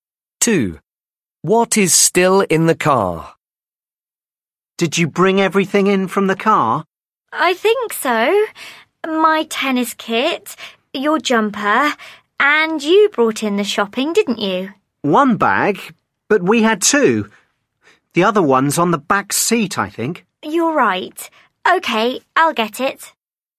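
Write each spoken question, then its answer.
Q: What is still in the car?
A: a shopping bag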